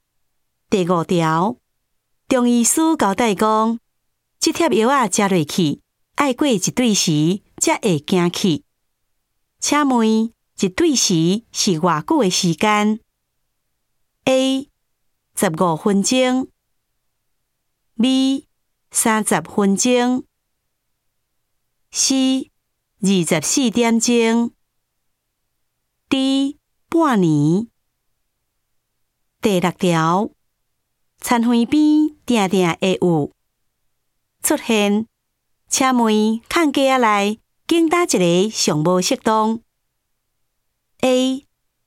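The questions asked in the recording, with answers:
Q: 请问一对时是偌久的时间 ?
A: C: 二十四点钟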